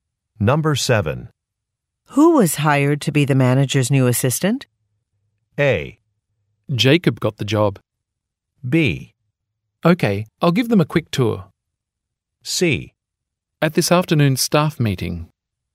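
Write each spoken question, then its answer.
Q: Who was hired to be the manager's new assistant?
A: A: Jacob got the job.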